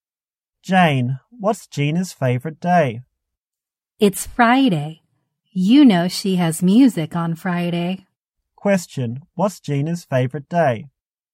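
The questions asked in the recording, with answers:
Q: What's Gina's favorite day?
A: Friday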